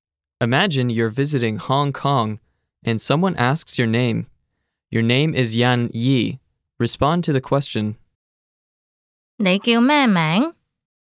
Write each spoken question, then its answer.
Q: 你叫咩名?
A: 我叫欣怡。